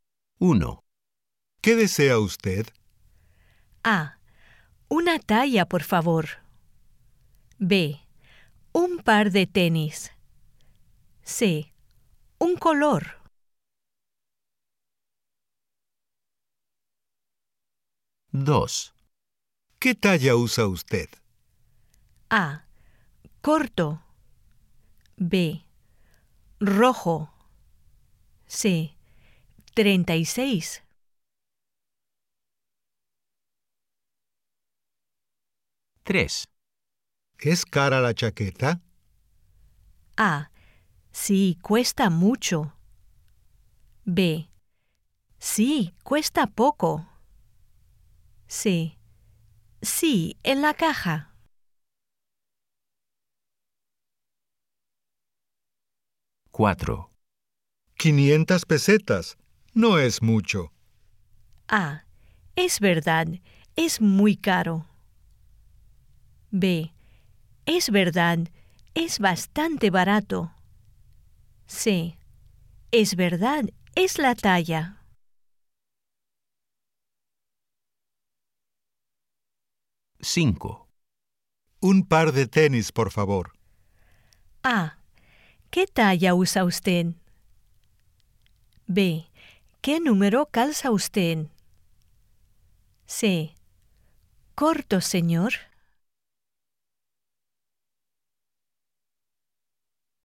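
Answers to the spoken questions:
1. B: Un par de tenis.
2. C: 36.
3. A: Sí, cuesta mucho.
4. B: Es verdad. Es bastante barato.
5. B: ¿Qué número calza usted?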